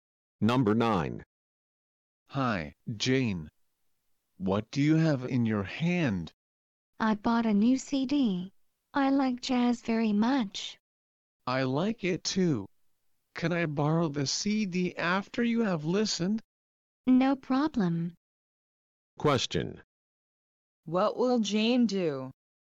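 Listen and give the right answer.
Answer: Lend her new jazz CD to the other person after listening to it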